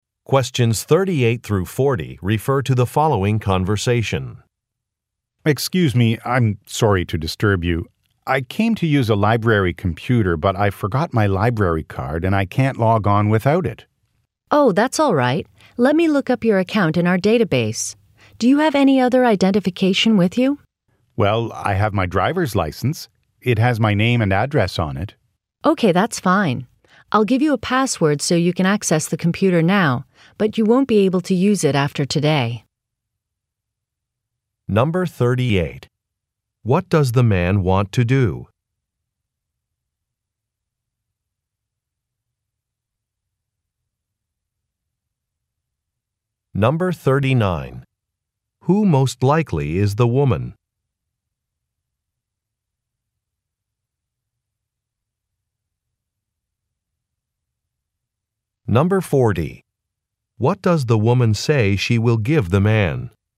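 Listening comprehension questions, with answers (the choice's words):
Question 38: What does the man want to do?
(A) Sign up for membership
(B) Use a computer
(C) Make a telephone call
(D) Borrow some materials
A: Use a computer

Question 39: Who most likely is the woman?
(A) A librarian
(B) A security guard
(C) A software developer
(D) A salesperson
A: A librarian

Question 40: What does the woman say she will give the man?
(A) An application form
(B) An Internet address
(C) A business card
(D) A temporary password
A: A temporary password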